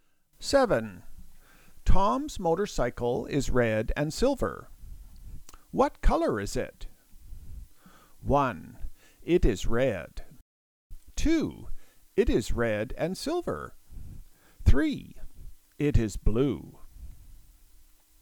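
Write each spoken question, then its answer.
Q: What color is it?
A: 2: It is red and silver.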